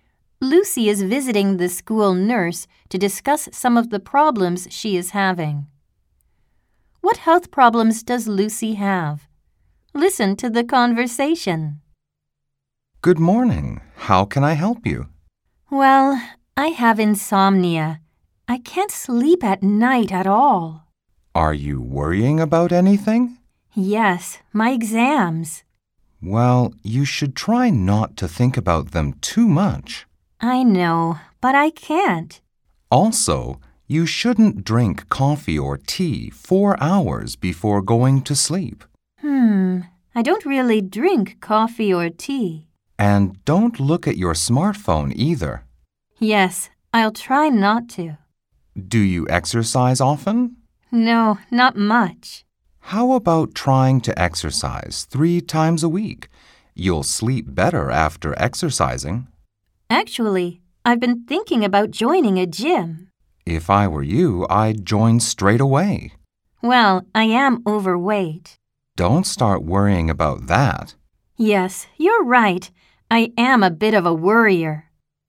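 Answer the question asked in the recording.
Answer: Insomnia (she can't sleep), caused by worrying about her exams; she is also overweight.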